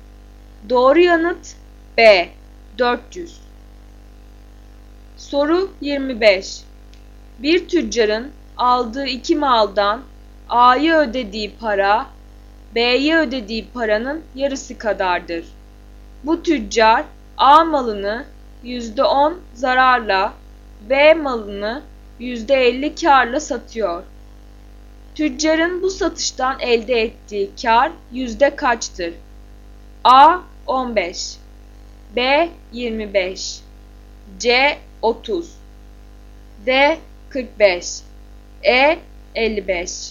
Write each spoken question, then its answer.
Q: Tüccarın bu satıştan elde ettiği kar yüzde kaçtır?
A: Doğru yanıt C 30.